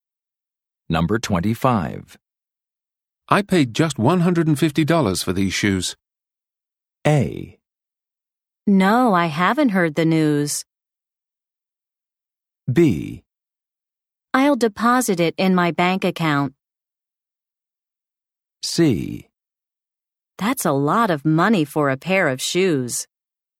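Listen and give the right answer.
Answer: C: That's a lot of money for a pair of shoes.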